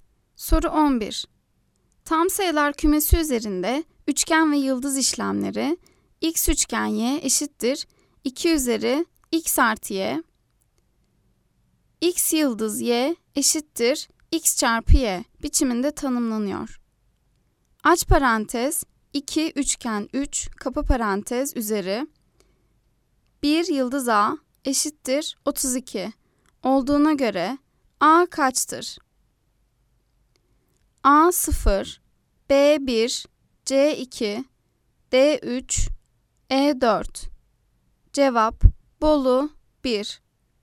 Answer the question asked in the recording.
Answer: Cevap Bolu 1.